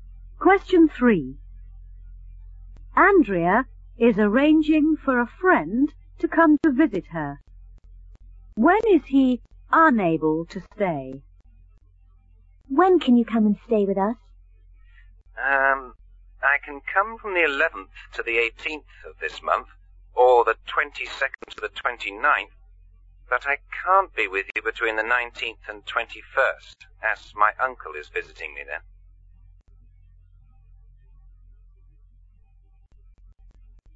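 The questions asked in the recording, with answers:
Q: When is he unable to stay?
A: Between the 19th and 21st of this month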